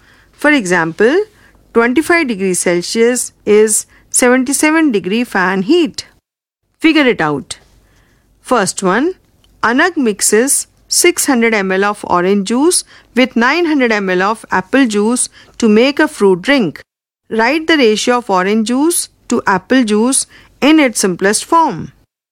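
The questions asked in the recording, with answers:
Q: Write the ratio of orange juice to apple juice in its simplest form.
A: 2:3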